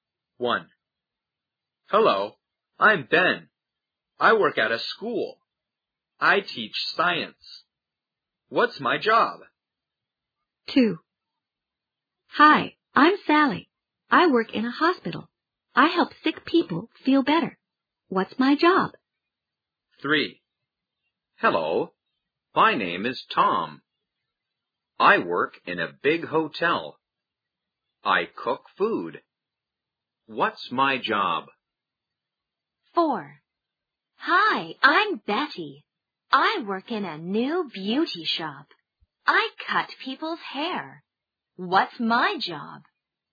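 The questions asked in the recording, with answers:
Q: What's my job?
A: a science teacher

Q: What's my job?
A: a cook

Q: What's my job?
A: a hairdresser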